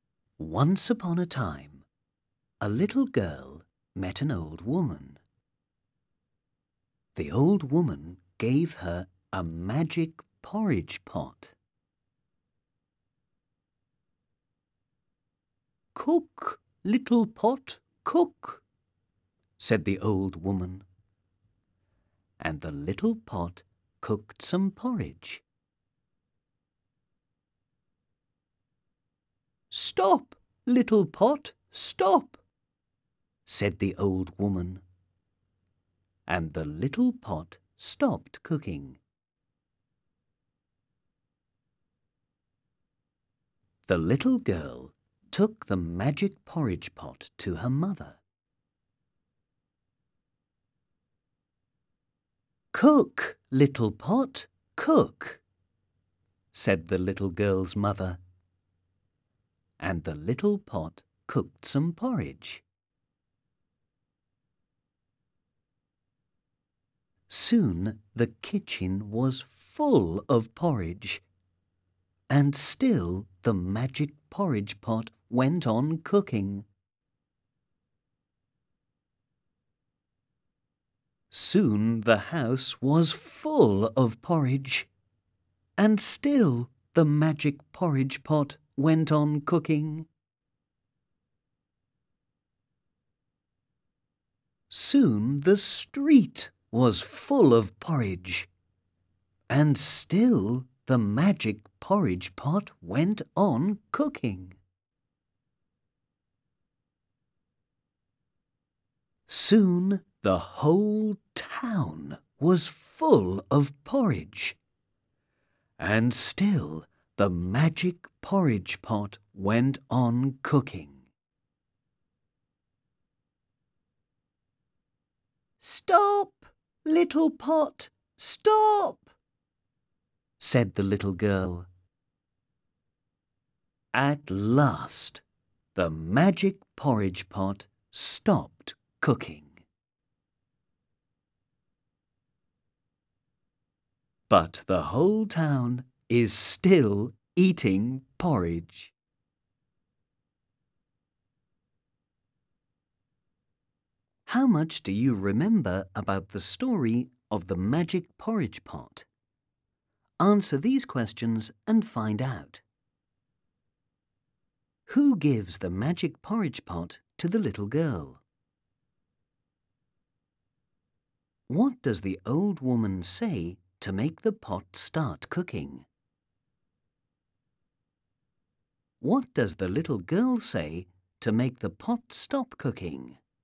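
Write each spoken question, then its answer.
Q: Who gives the magic porridge pot to the little girl?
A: An old woman

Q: What does the old woman say to make the pot start cooking?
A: Cook, little pot, cook

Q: What does the little girl say to make the pot stop cooking?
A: Stop, little pot, stop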